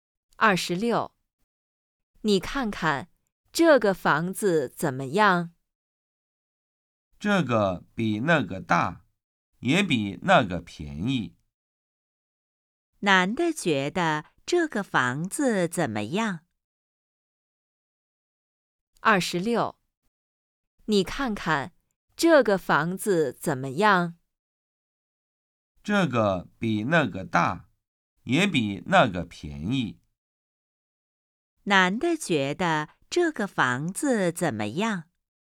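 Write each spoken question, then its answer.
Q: 男的觉得这个房子怎么样?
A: 比那个大,也比那个便宜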